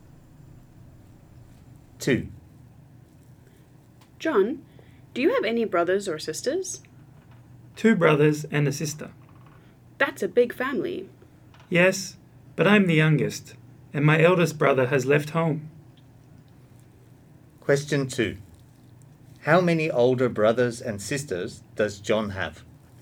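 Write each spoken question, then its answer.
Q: How many older brothers and sisters does John have?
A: Three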